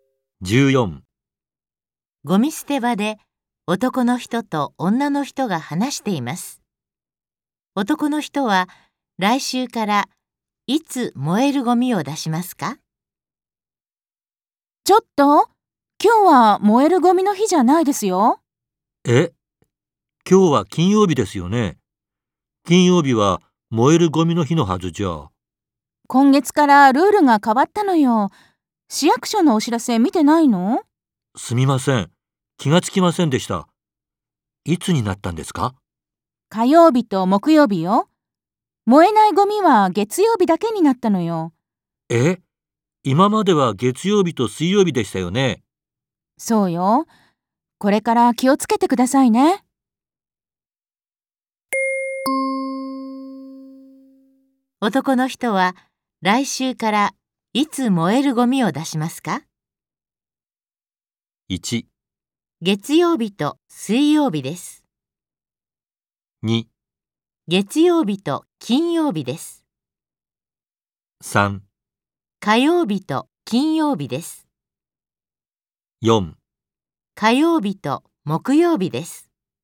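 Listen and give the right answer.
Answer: 4: 火曜日と木曜日です。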